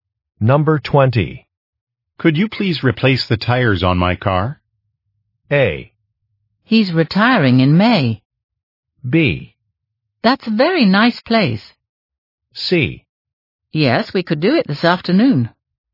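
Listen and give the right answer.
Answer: C: Yes, we could do it this afternoon.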